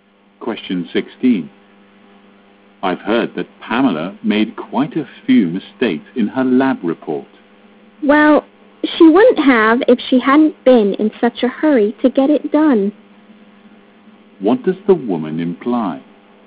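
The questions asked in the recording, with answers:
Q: What does the woman imply?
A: Pamela made mistakes because she was in too much of a hurry.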